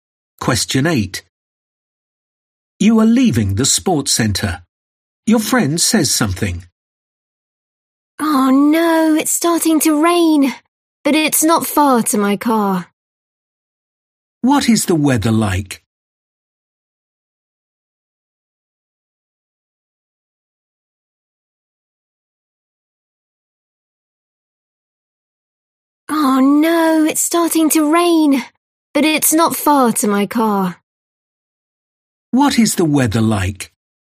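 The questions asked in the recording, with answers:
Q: What is the weather like?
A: it's starting to rain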